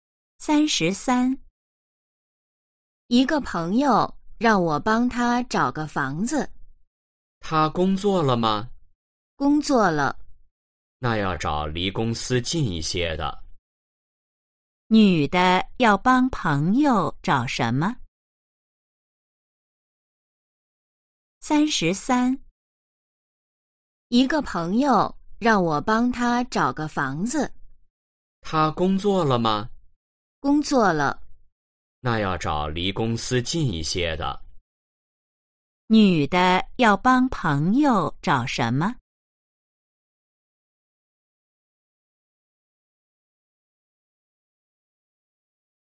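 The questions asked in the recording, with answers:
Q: 女的要帮朋友找什么?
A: 房子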